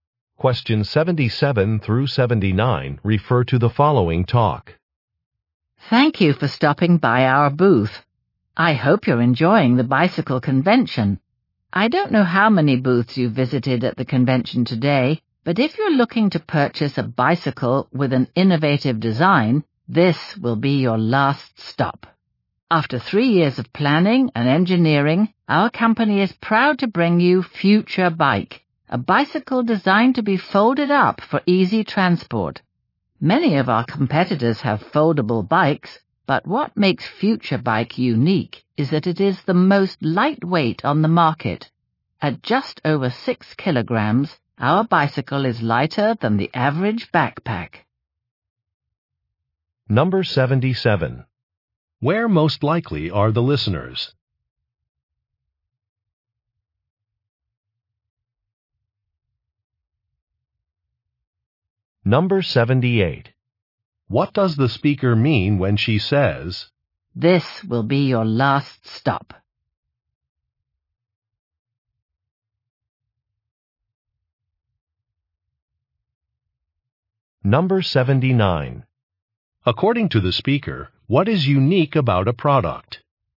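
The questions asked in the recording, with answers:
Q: Where most likely are the listeners?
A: At a bicycle convention

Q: According to the speaker, what is unique about a product?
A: It is the most lightweight foldable bike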